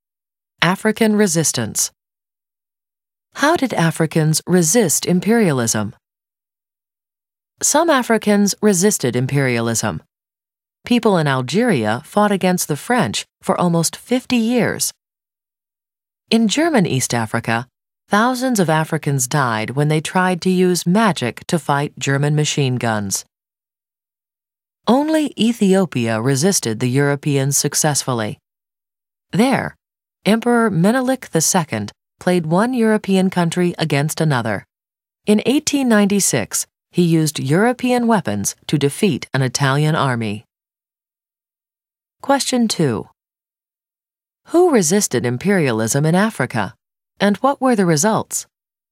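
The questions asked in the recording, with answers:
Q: Who resisted imperialism in Africa, and what were the results?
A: Algerians fought the French for almost 50 years; Africans in German East Africa died fighting with magic against machine guns; only Ethiopia under Menelik II succeeded, defeating Italy in 1896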